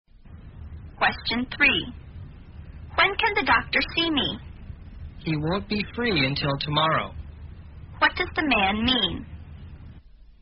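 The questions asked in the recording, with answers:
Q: What does the man mean?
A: The doctor can't see the speaker until tomorrow.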